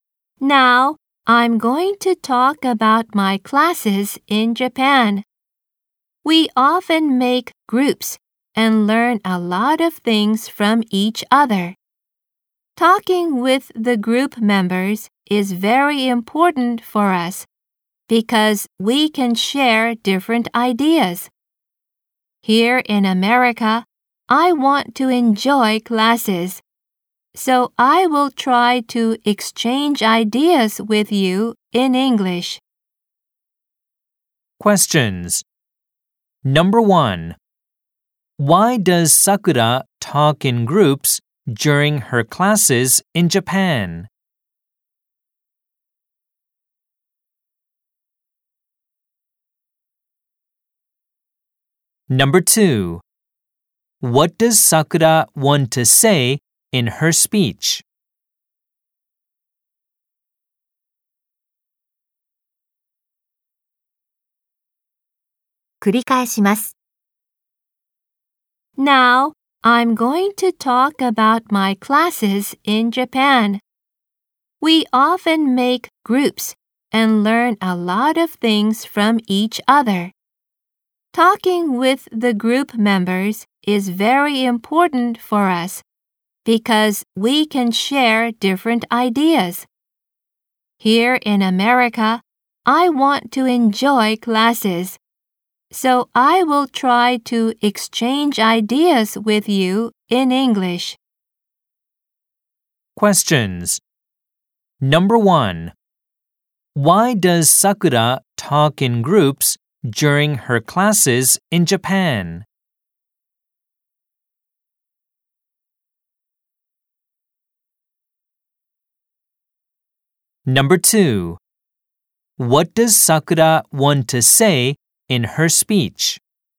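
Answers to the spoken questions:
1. Because they can share different ideas
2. She wants to enjoy classes by exchanging ideas in English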